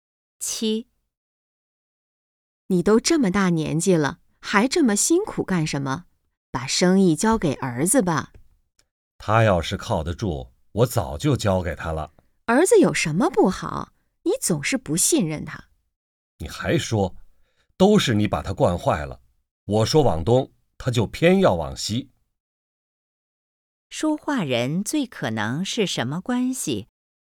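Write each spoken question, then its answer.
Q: 说话人最可能是什么关系?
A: 夫妻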